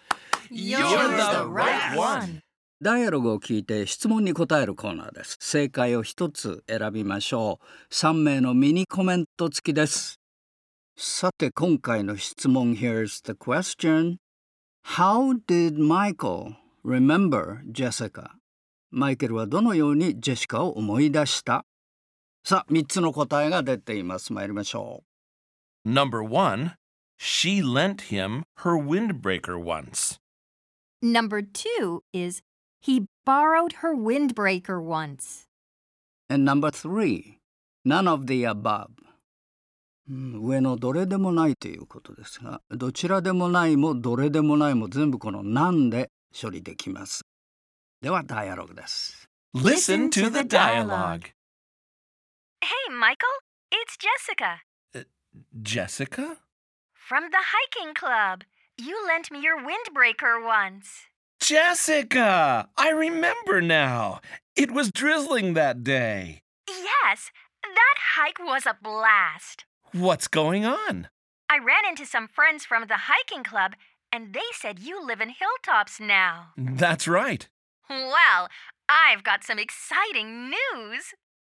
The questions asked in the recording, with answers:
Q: How did Michael remember Jessica?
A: So the right answer is number three. None of the above.